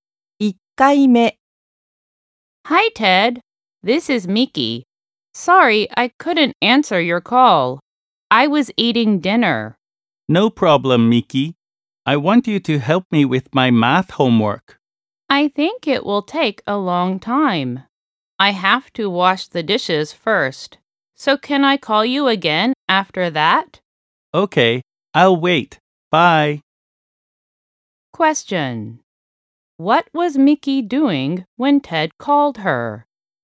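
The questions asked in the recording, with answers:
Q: What was Miki doing when Ted called her?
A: Eating dinner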